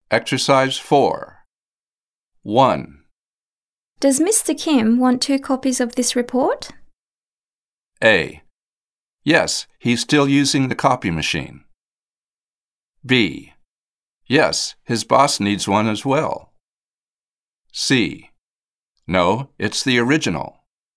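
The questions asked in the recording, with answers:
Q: Does Mr. Kim want two copies of this report?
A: B: Yes, his boss needs one as well.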